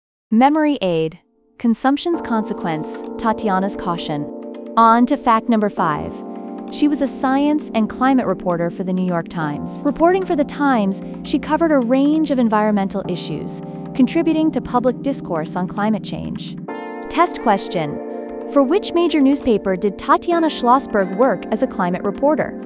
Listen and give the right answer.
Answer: The New York Times.